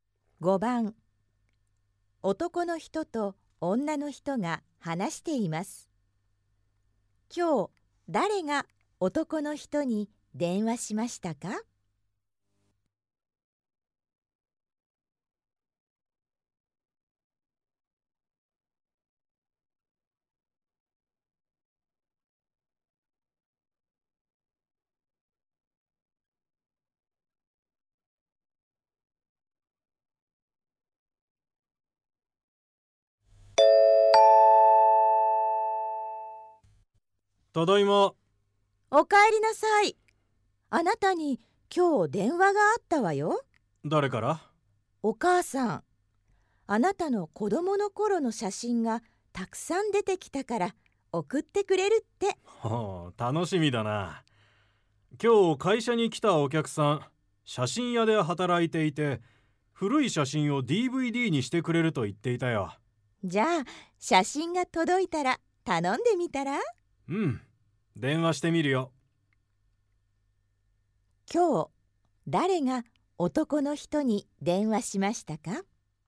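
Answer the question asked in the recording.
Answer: 男の人のお母さん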